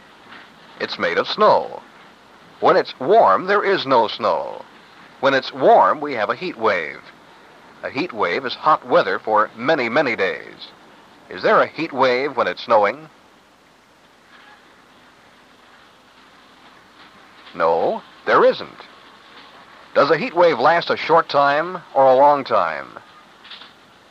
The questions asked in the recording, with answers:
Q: Is there a heat wave when it's snowing?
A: No, there isn't.

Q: Does a heat wave last a short time or a long time?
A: It lasts a long time.